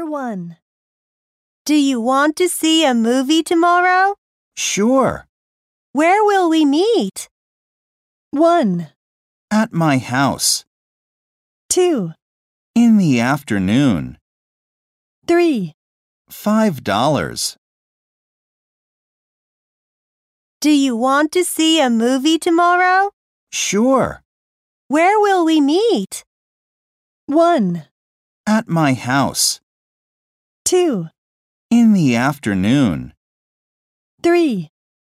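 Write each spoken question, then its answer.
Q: Where will we meet?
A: 1: At my house.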